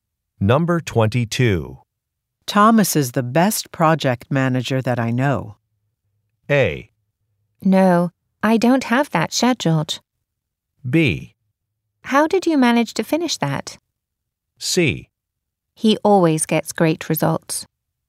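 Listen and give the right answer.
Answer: C: He always gets great results.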